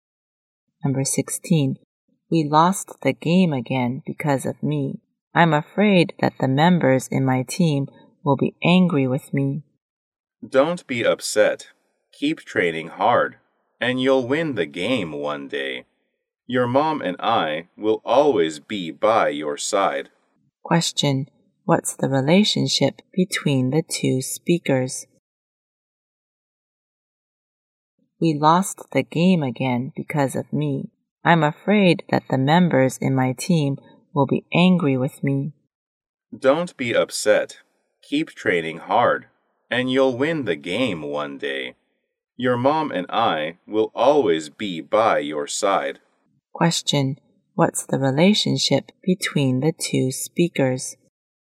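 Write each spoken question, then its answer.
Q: What's the relationship between the two speakers?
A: Father and son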